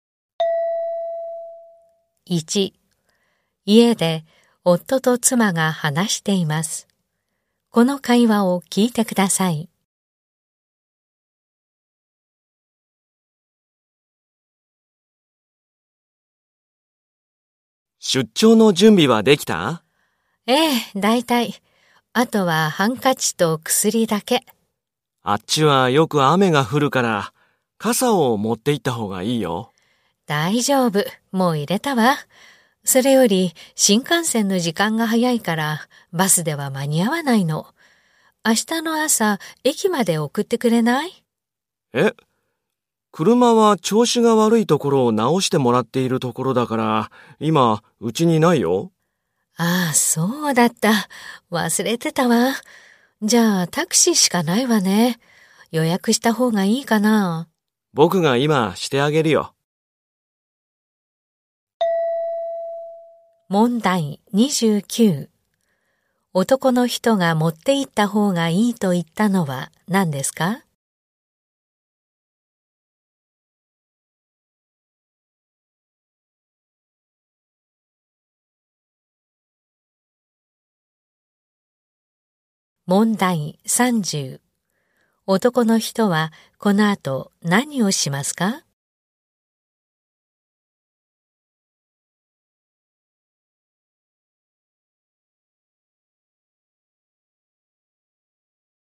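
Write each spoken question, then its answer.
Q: 男の人はこの後何をしますか?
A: タクシーを予約する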